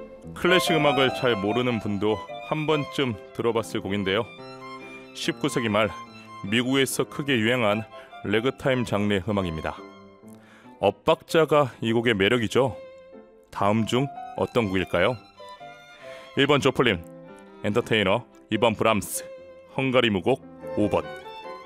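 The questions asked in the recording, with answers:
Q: 다음 중 어떤 곡일까요?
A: 1번: 조플린, 엔터테이너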